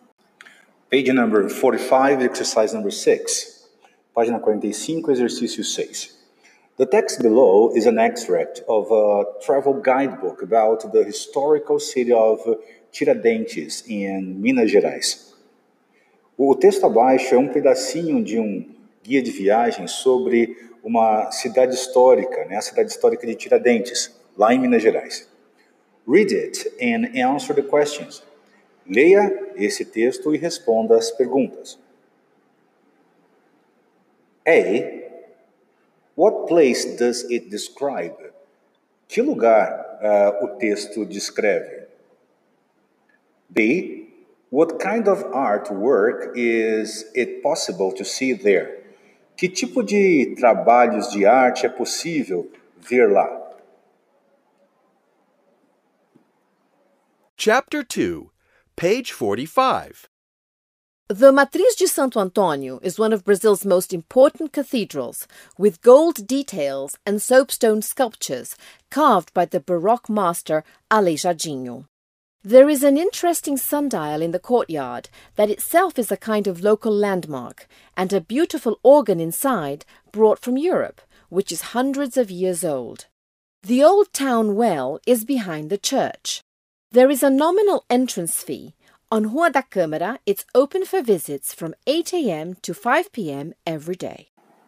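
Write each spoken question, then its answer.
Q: What place does it describe?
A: The Matriz de Santo Antônio cathedral in Tiradentes

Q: What kind of artwork is it possible to see there?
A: Gold details and soapstone sculptures by Aleijadinho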